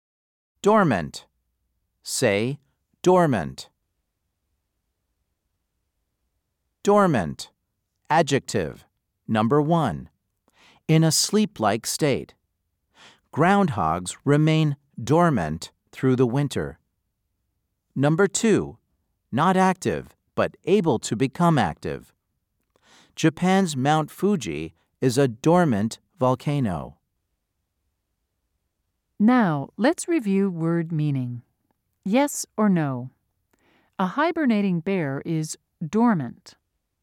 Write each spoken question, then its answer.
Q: Yes or no? A hibernating bear is dormant.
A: If you said yes, you are correct.